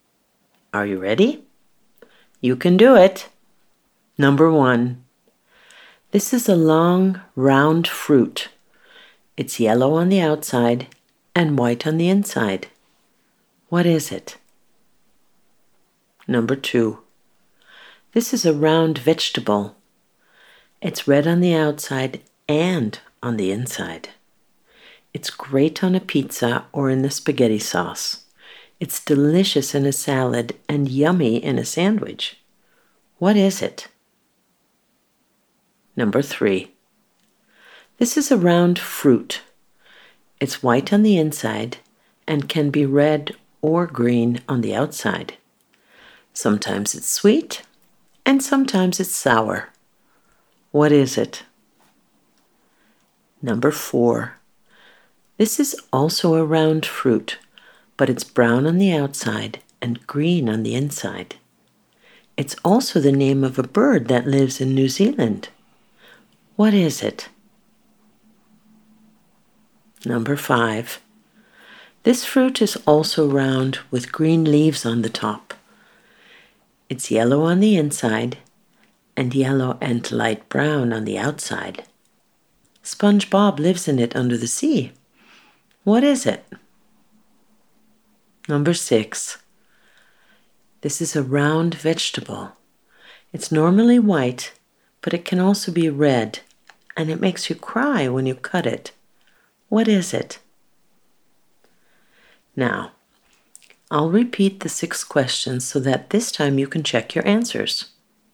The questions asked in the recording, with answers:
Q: What is it?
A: That's right, it's a banana.

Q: What is it?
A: That's right, it's a tomato.

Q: What is it?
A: You're right. It's an apple.

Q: What is it?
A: It's a kiwi.

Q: What is it?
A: It's a pineapple.

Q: What is it?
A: That's right, it's an onion.